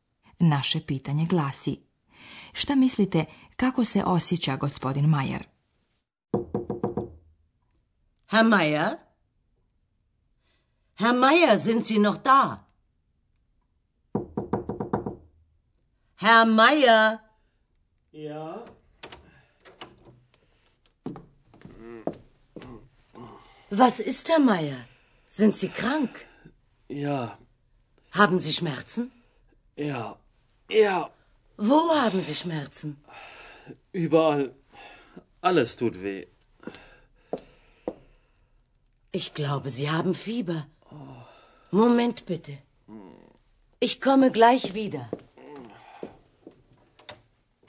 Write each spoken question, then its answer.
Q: šta mislite, kako se osjeća gospodin Mayer?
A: Vjerovatno ste prepoznali da je gospodinu Mayeru loše, on je bolestan.